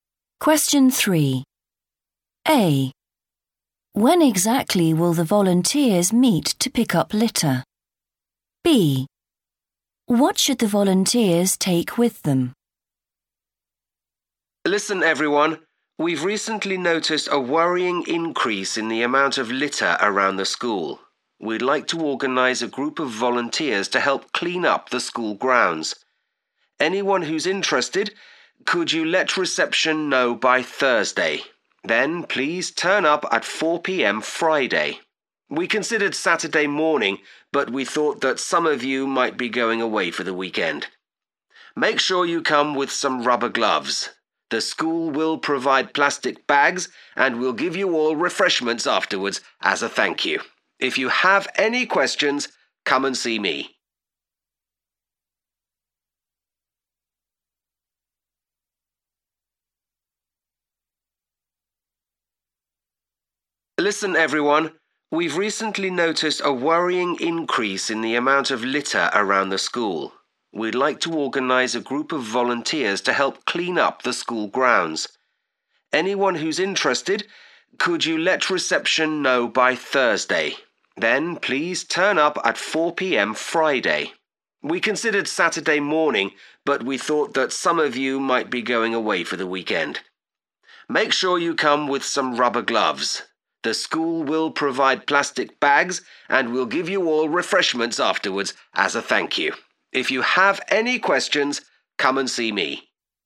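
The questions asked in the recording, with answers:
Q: When exactly will the volunteers meet to pick up litter?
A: 4 p.m. Friday

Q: What should the volunteers take with them?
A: rubber gloves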